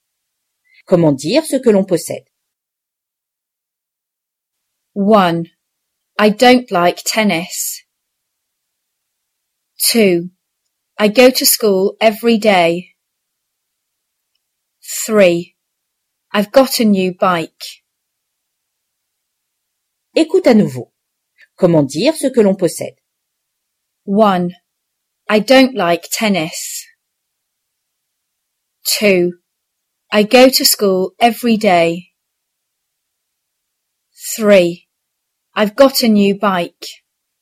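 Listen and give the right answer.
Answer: 3: I've got a new bike.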